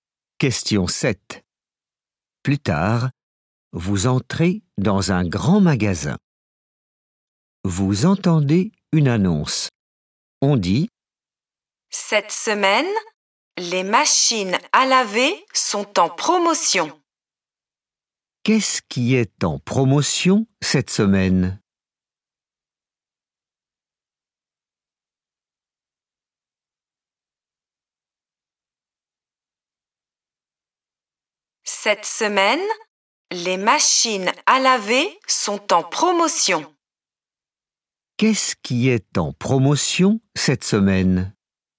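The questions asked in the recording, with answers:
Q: Qu'est-ce qui est en promotion cette semaine?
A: les machines à laver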